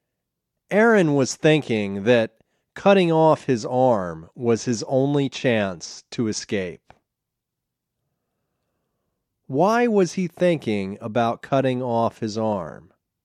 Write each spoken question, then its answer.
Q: Why was he thinking about cutting off his arm?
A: He was thinking of cutting off his arm because it was his only chance to escape.